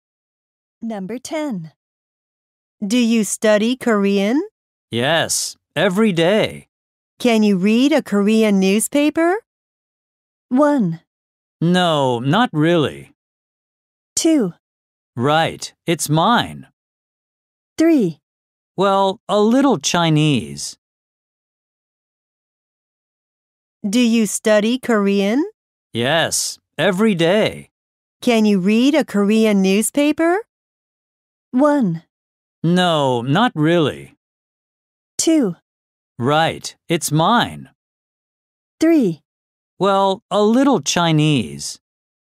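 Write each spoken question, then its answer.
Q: Can you read a Korean newspaper?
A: 1: No, not really.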